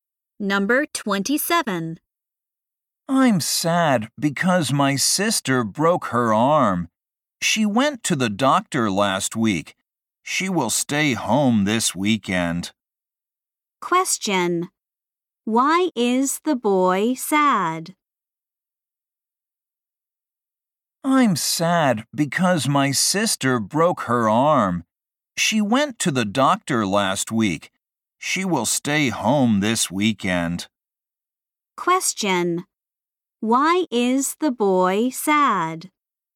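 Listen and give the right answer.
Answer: His sister broke her arm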